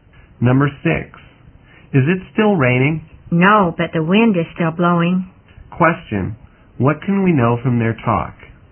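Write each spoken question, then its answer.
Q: What can we know from their talk?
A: It has stopped raining but it is still windy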